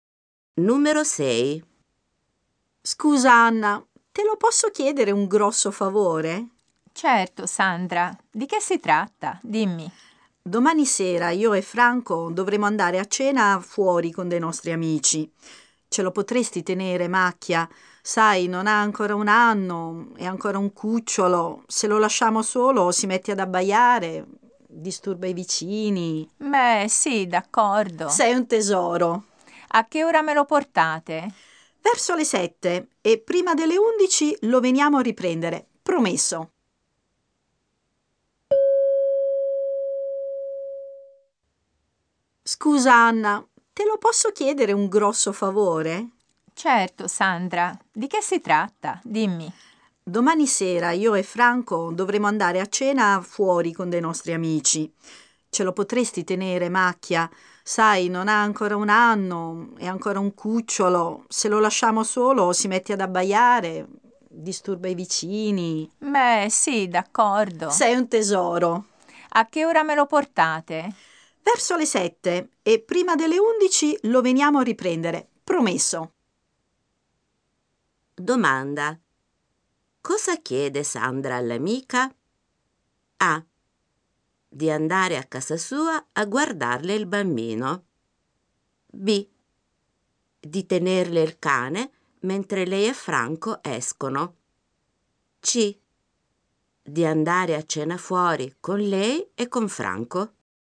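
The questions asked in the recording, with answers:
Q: Domanda. Cosa chiede Sandra all'amica?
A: B: Di tenerle il cane mentre lei e Franco escono.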